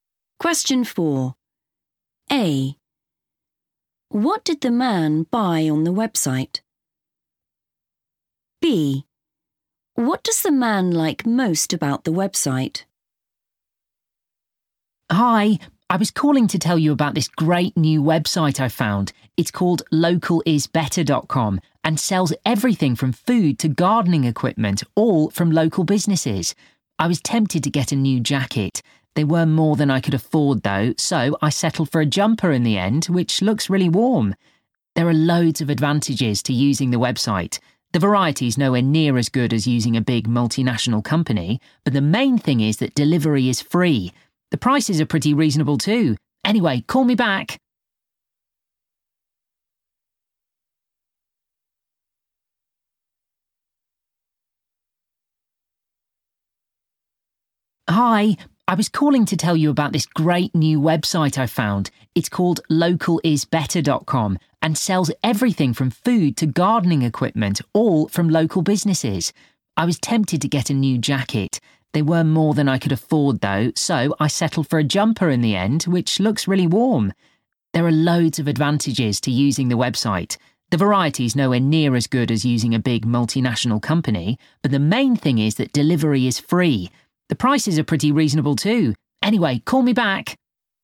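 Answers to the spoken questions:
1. a jumper
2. free delivery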